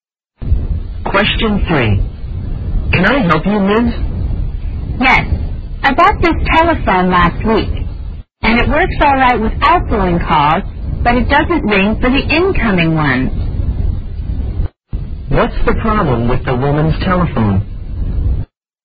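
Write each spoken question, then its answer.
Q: What's the problem with the woman's telephone?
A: It doesn't ring for incoming calls.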